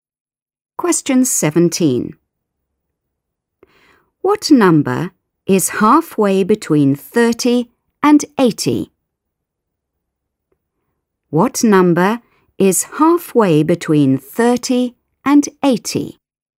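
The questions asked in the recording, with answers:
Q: What number is halfway between 30 and 80?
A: 55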